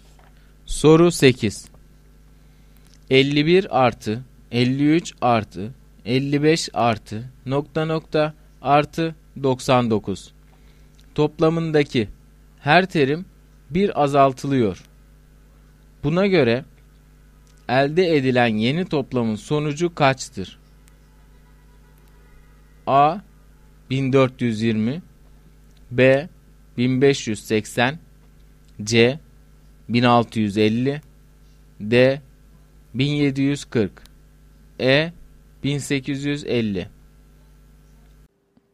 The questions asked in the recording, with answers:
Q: Buna göre elde edilen yeni toplamın sonucu kaçtır?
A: Doğru cevap E şıkkı.